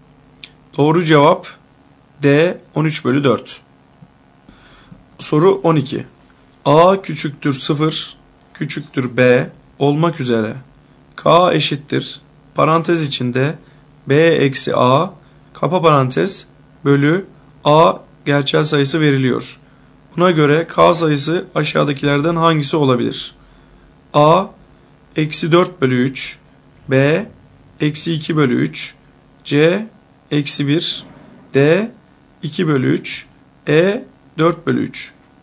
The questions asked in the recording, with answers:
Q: Buna göre K sayısı aşağıdakilerden hangisi olabilir?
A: Doğru cevap A eksi 4 bölü 3.